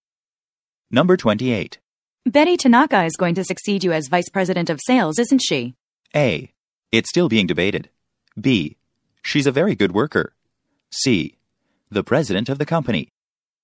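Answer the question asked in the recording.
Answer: A: It's still being debated.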